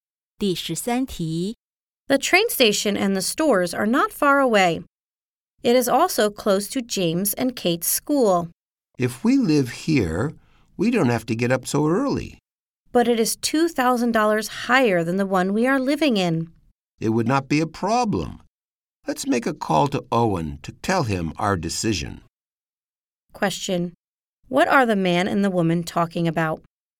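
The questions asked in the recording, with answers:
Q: What are the man and the woman talking about?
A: Moving to a new home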